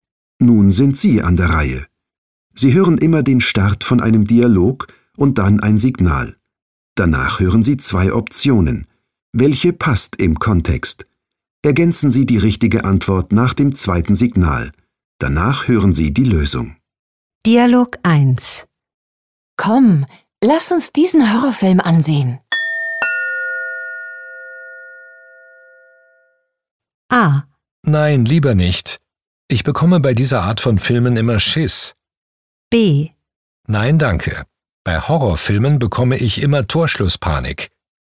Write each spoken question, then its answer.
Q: Komm, lass uns diesen Horrorfilm ansehen.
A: A. Nein, lieber nicht. Ich bekomme bei dieser Art von Filmen immer Schiss.